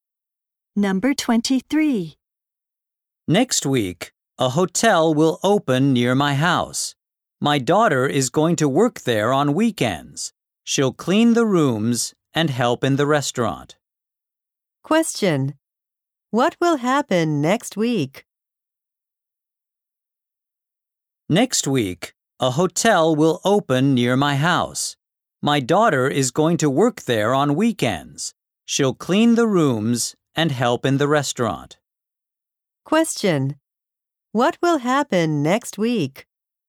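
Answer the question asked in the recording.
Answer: A hotel will open near the speaker's house.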